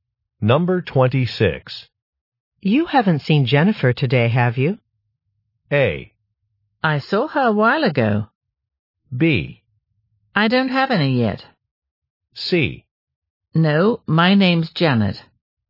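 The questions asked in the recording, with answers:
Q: You haven't seen Jennifer today, have you?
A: A: I saw her a while ago.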